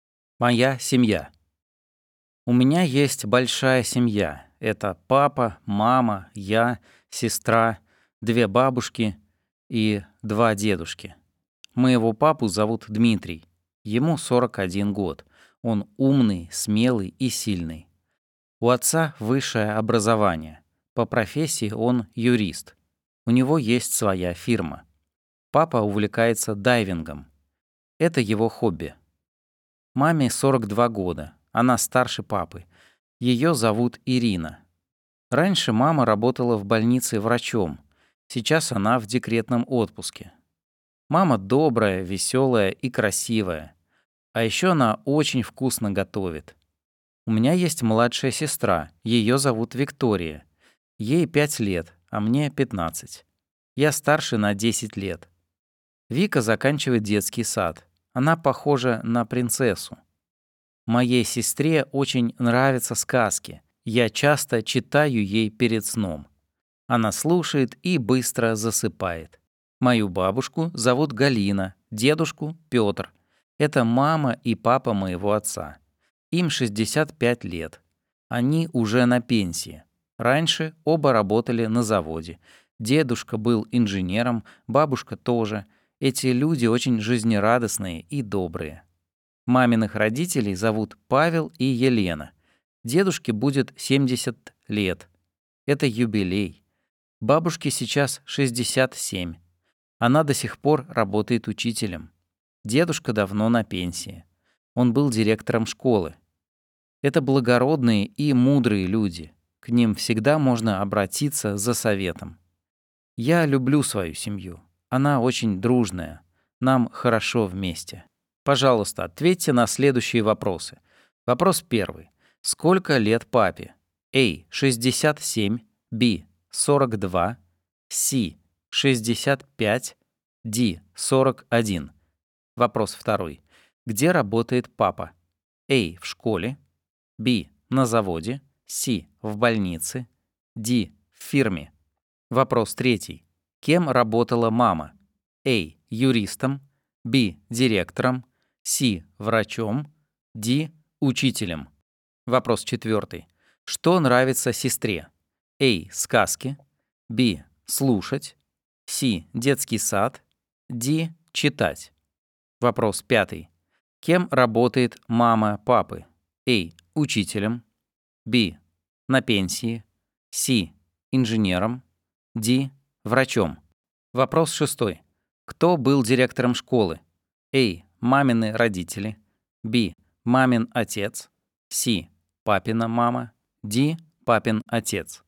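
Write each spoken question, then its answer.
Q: Сколько лет папе?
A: D: 41

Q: Где работает папа?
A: D: В фирме

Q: Кем работала мама?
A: C: Врачом

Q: Что нравится сестре?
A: A: Сказки

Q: Кем работает мама папы?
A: B: На пенсии

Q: Кто был директором школы?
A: B: Мамин отец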